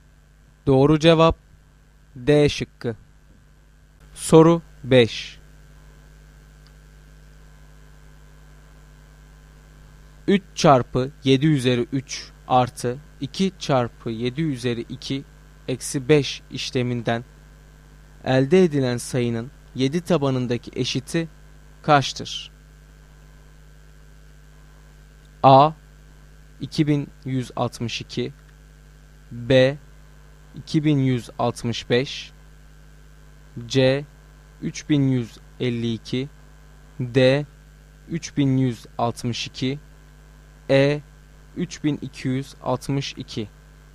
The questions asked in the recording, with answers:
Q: 3 çarpı 7 üzeri 3 artı 2 çarpı 7 üzeri 2 eksi 5 işleminden elde edilen sayının 7 tabanındaki eşiti kaçtır?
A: Doğru cevap D şıkkı.